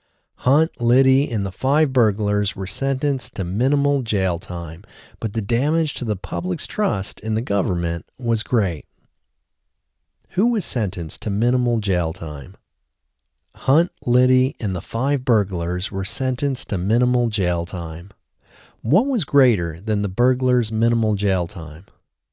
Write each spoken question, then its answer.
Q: Who was sentenced to minimal jail time?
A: Hunt, Liddy, and the five burglars were sentenced to minimal jail time.

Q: What was greater than the burglars' minimal jail time?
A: The damage to the public's trust in the government was greater than the burglars' minimal jail time.